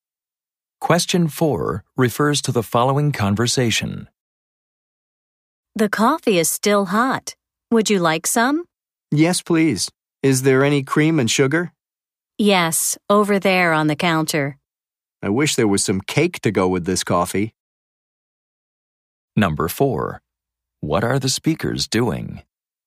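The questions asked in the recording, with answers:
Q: What are the speakers doing?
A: Drinking coffee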